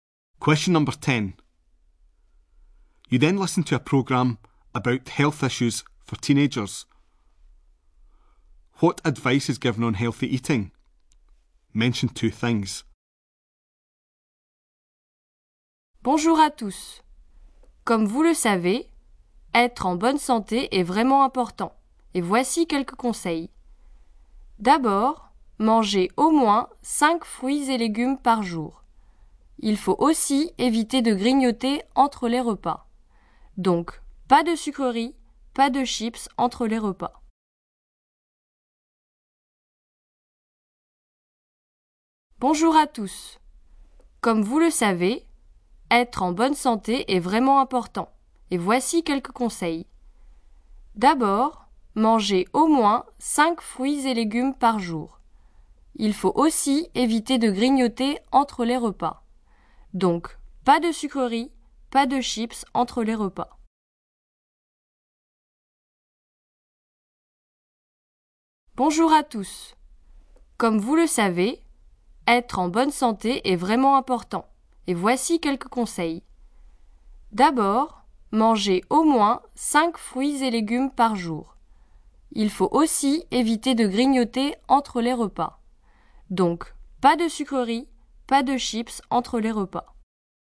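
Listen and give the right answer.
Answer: Eat at least 5 fruit and vegetables a day; avoid snacking between meals (no sweets or crisps)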